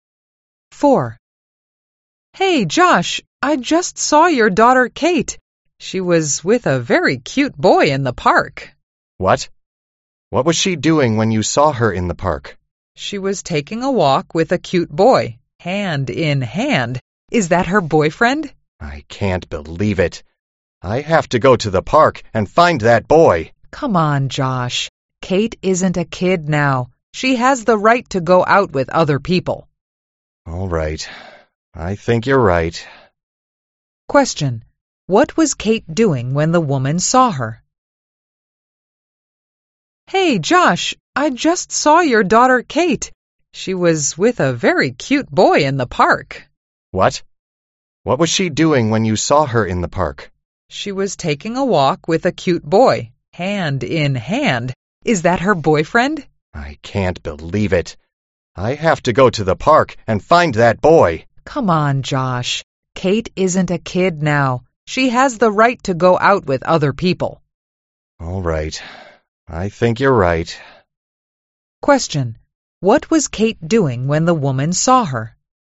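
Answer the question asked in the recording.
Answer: Taking a walk in the park hand in hand with a boy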